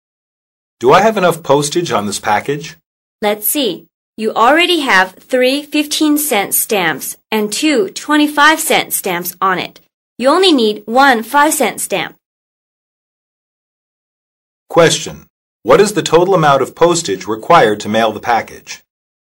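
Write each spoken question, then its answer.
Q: What is the total amount of postage required to mail the package?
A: $1.00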